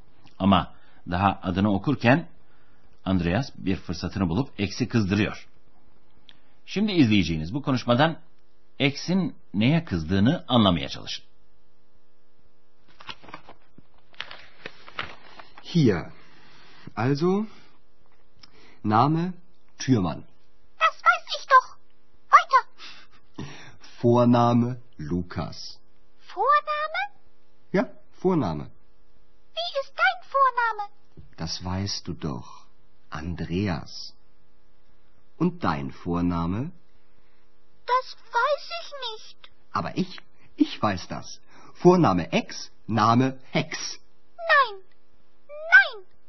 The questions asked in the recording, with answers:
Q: Şimdi izleyeceğiniz bu konuşmadan Eks'in neye kızdığını anlamaya çalışın.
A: X, Andreas'ın kendisine bulduğu soyadına kızdı.